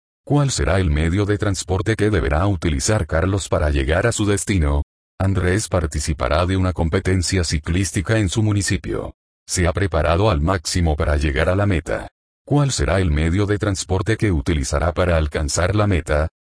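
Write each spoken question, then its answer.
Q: ¿Cuál será el medio de transporte que utilizará para alcanzar la meta?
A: La bicicleta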